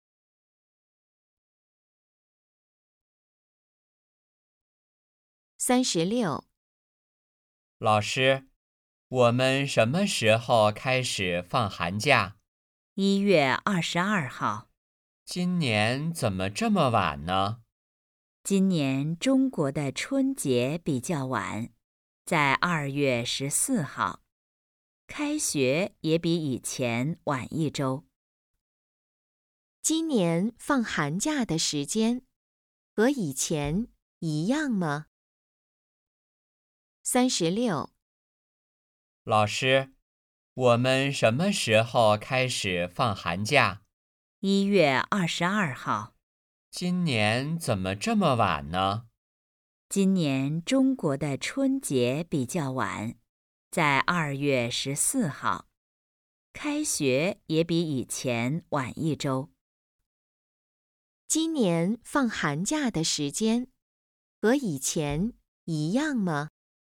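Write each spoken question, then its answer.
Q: 今年放寒假的时间和以前一样吗?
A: 不一样,比以前晚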